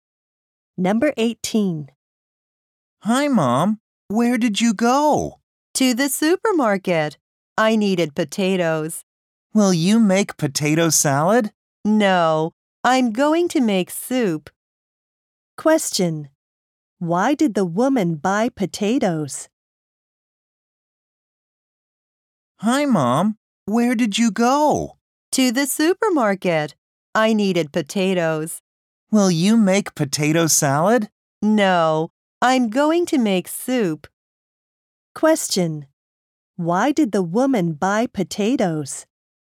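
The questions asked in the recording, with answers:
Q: Why did the woman buy potatoes?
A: To make soup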